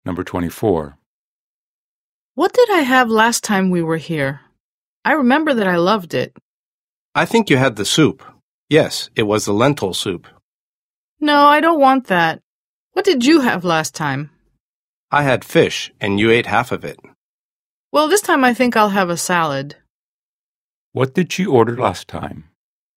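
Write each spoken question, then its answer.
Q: What did she order last time?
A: lentil soup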